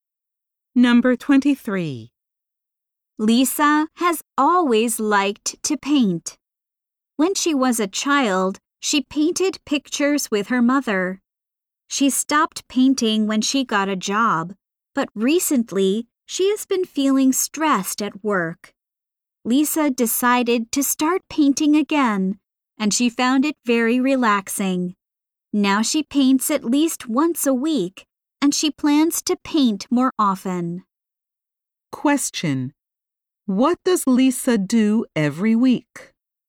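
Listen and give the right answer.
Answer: She paints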